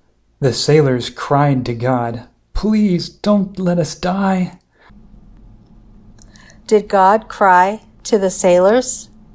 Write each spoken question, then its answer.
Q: Did God cry to the sailors?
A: No, the sailors cried to God.